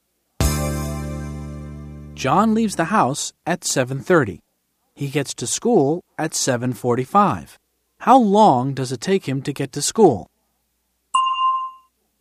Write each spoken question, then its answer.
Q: How long does it take him to get to school?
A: It takes him 15 minutes. It takes him 15 minutes to get to school.